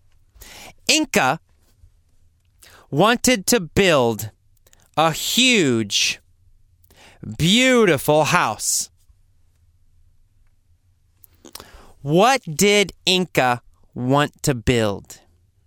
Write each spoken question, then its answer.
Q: What did Inca want to build?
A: Well, Inca wanted to build a huge, beautiful house.